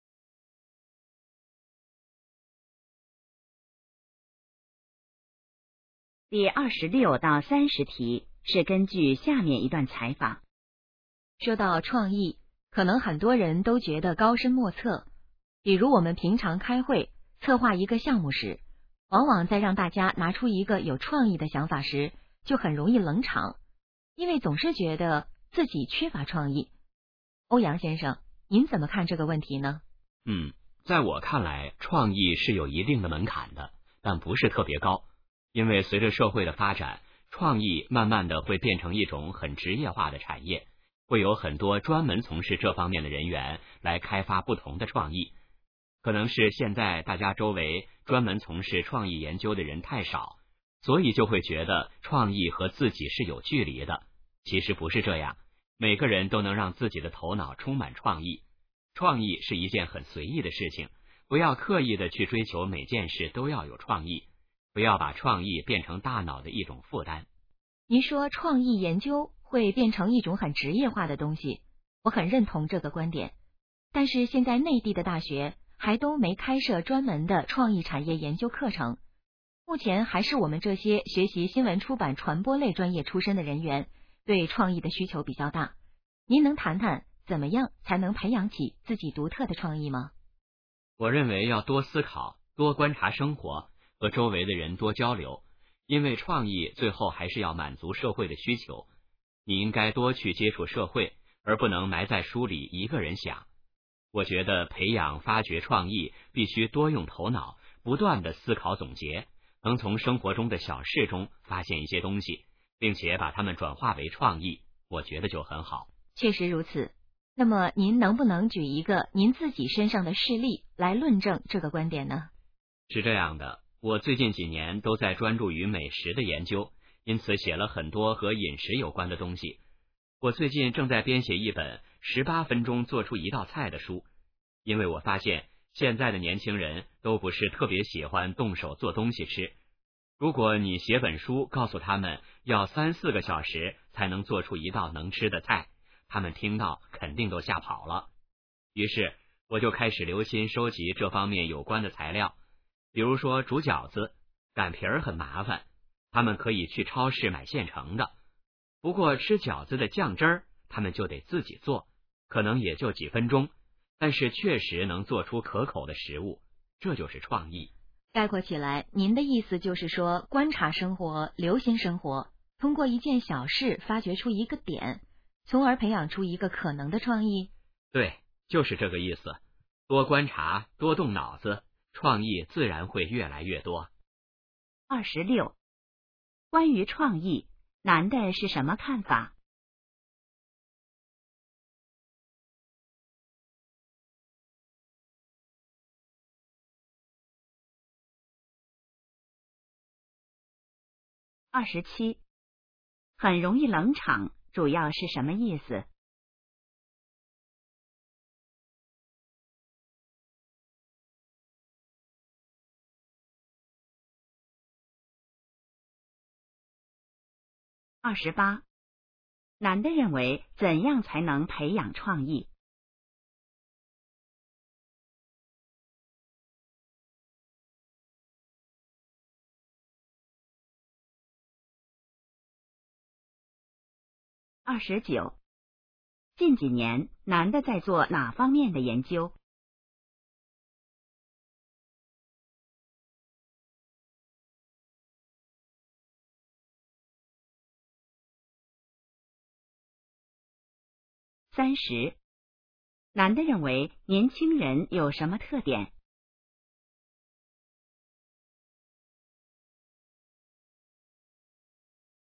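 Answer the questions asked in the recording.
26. 创意有门槛但不高,每个人都能有创意
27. 大家都不说话,场面冷清
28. 多思考,多观察生活,多和人交流
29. 美食
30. 不喜欢动手做东西吃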